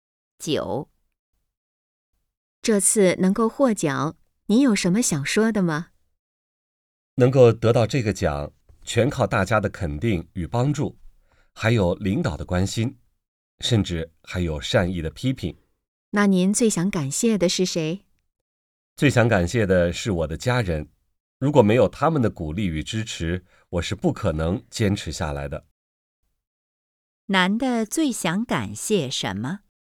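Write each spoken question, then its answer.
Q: 男的最想感谢什么?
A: 家人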